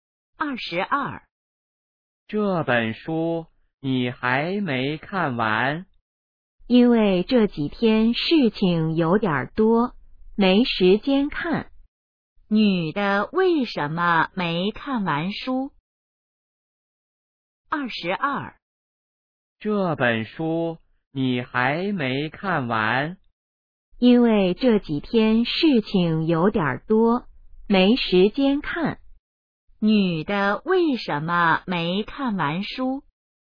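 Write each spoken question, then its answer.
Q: 女的为什么没看完书?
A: 这几天事情多,没时间看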